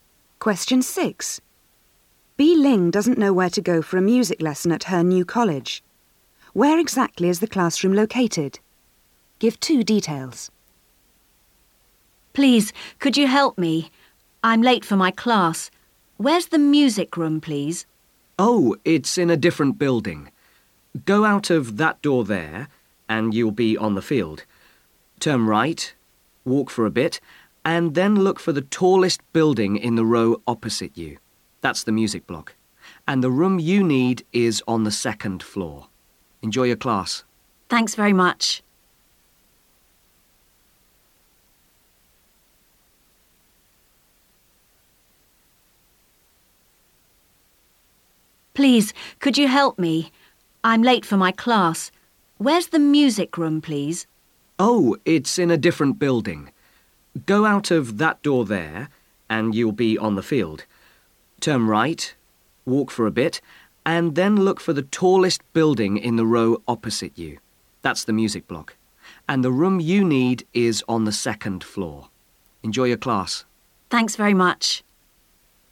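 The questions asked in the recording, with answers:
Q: Where exactly is the classroom located?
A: In the tallest building (the music block) opposite, on the second floor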